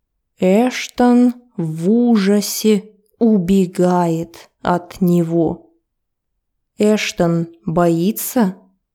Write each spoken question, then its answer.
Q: Эштон боится?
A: Да, он боится. Он в ужасе.